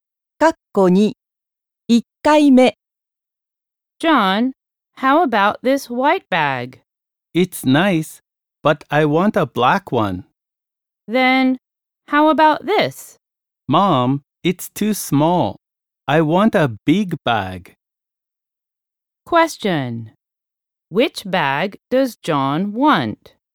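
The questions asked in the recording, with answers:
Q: Which bag does John want?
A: A big black bag.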